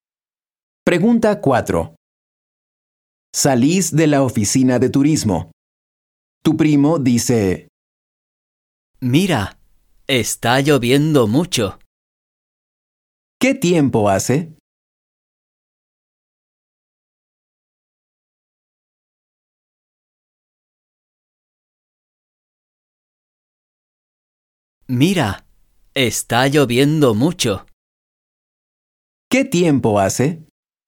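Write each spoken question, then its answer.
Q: ¿Qué tiempo hace?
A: Está lloviendo mucho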